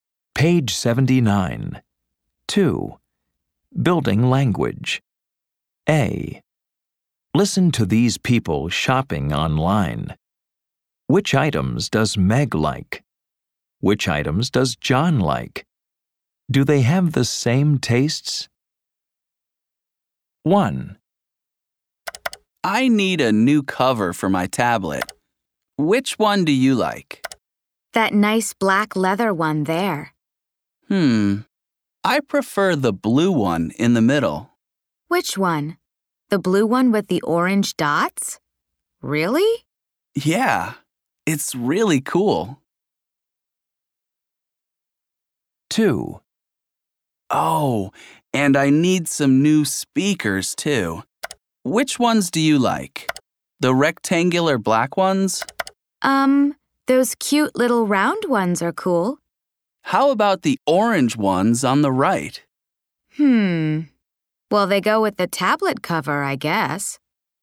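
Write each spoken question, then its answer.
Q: Do they have the same tastes?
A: No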